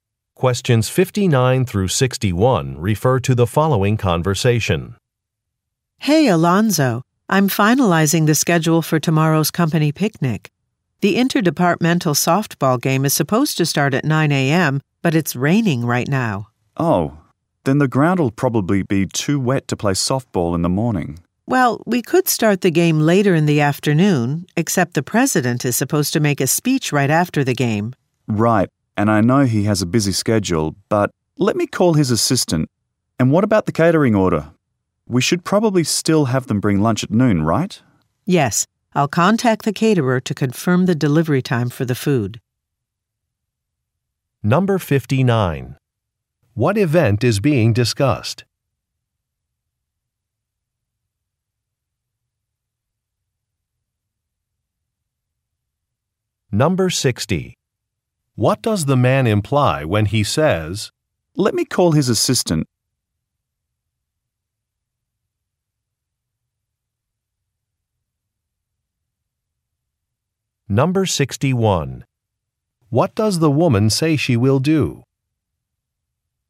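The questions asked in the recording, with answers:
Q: What event is being discussed?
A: A company picnic

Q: What does the woman say she will do?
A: Contact the caterer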